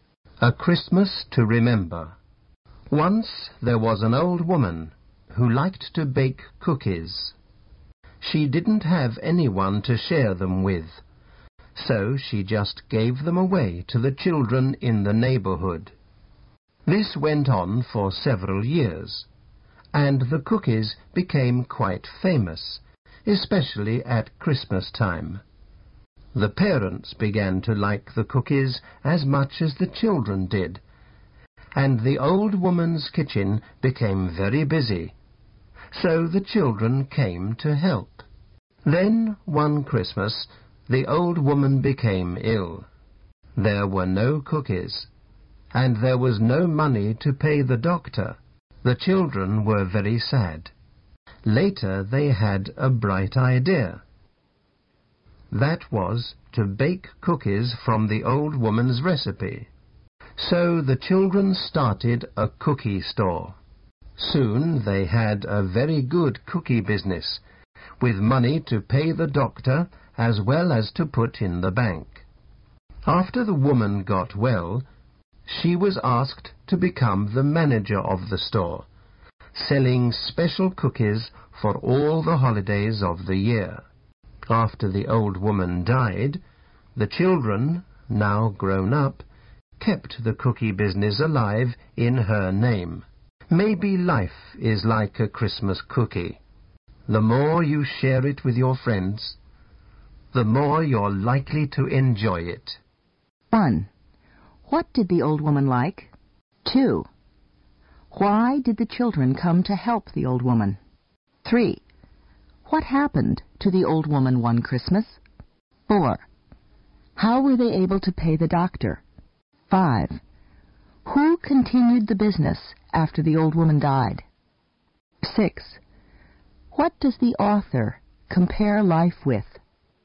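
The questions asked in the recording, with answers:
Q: What did the old woman like?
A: Baking cookies

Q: Why did the children come to help the old woman?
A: Her kitchen became very busy

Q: What happened to the old woman one Christmas?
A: She became ill

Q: How were they able to pay the doctor?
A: The children started a cookie store

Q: Who continued the business after the old woman died?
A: The children, now grown up

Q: What does the author compare life with?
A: A Christmas cookie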